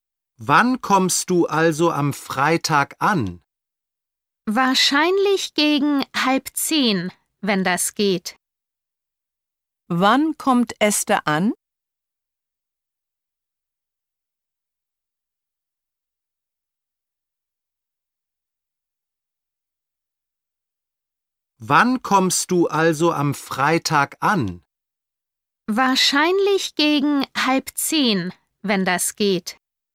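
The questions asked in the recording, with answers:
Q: Wann kommt Esther an?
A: Am Freitag gegen 9:30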